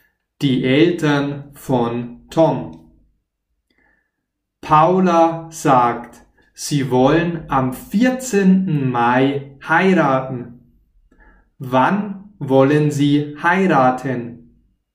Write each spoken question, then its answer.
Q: Wann wollen sie heiraten?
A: Am 14. Mai. Sie wollen am 14.